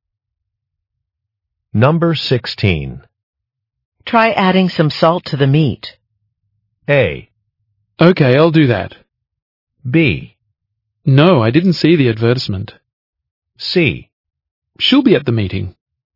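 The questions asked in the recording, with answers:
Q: Try adding some salt to the meat.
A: A: Okay, I'll do that.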